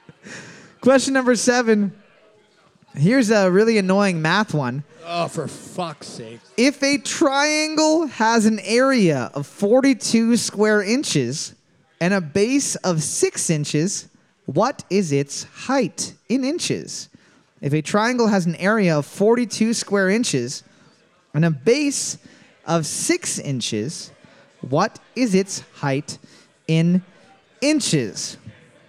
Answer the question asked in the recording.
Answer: 14 inches.